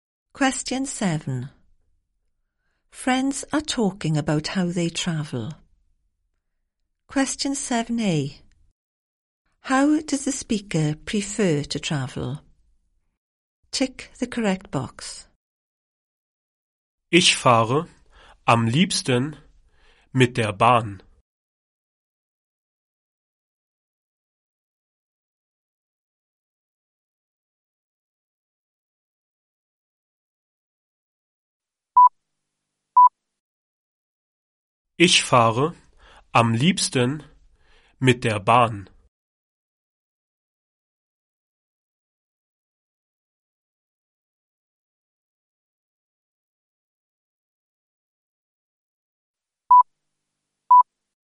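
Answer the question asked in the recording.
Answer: By train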